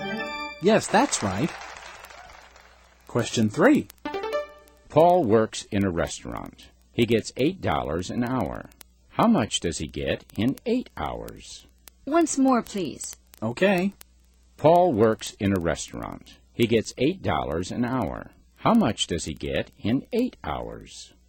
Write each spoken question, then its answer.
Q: How much does he get in 8 hours?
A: He gets $64.